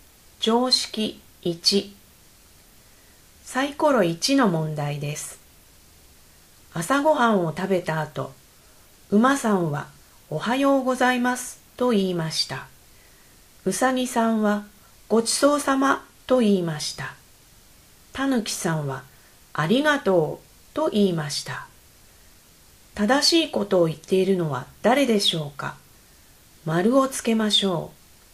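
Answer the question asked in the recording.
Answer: うさぎさん(ごちそうさま)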